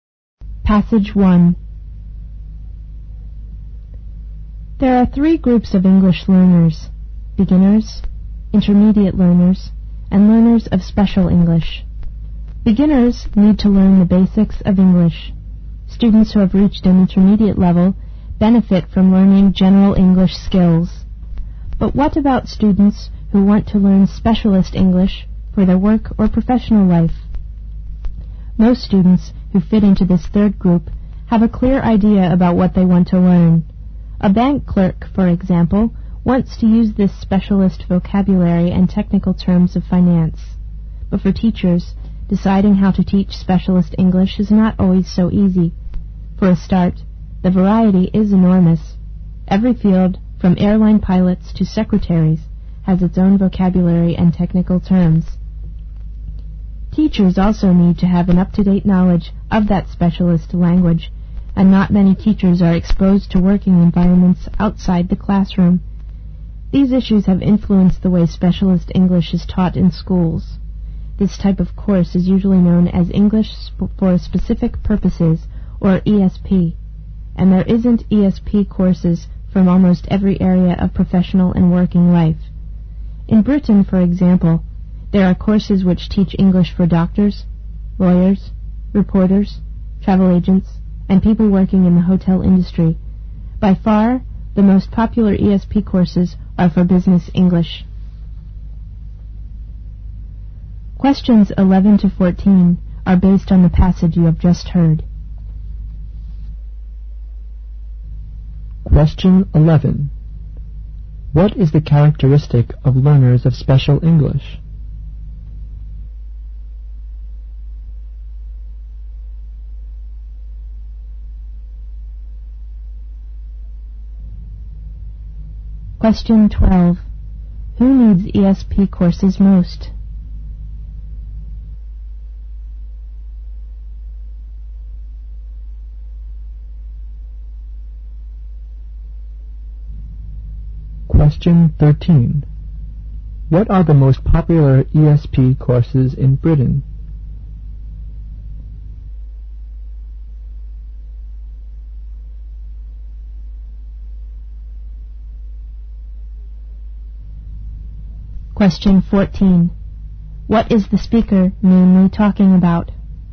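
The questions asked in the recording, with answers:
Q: What is the characteristic of learners of special English?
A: They have a clear idea about what they want to learn.

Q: Who needs ESP courses most?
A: People who need specialist English for their work or professional life.

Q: What are the most popular ESP courses in Britain?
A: Business English courses.

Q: What is the speaker mainly talking about?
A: Teaching and learning specialist English (ESP).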